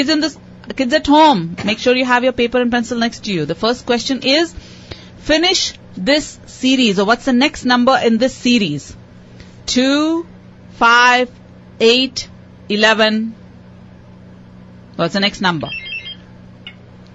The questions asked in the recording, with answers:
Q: 2, 5, 8, 11. What's the next number?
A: 14.